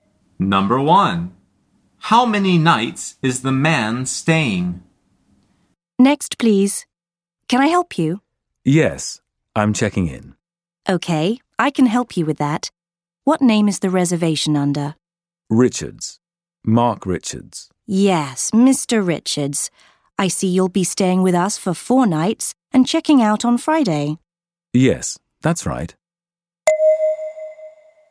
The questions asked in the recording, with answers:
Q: How many nights is the man staying?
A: The answer is 4.